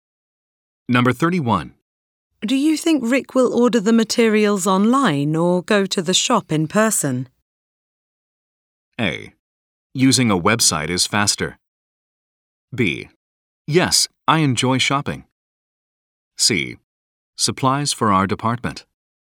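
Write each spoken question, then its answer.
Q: Do you think Rick will order the materials online or go to the shop in person?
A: A: Using a website is faster.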